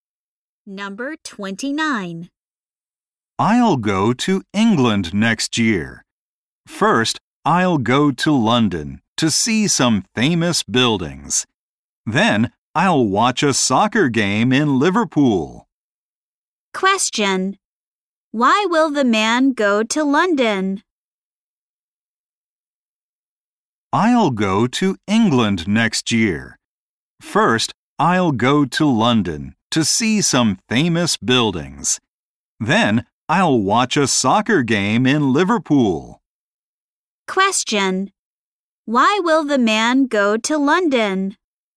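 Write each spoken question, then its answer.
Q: Question. Why will the man go to London?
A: To see some famous buildings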